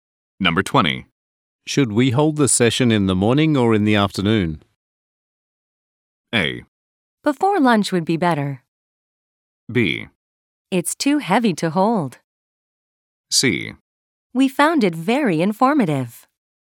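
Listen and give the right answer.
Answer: A: Before lunch would be better.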